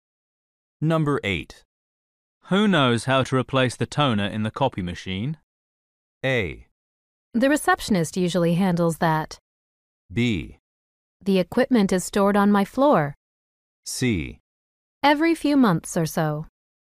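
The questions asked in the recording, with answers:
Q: Who knows how to replace the toner in the copy machine?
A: A: The receptionist usually handles that.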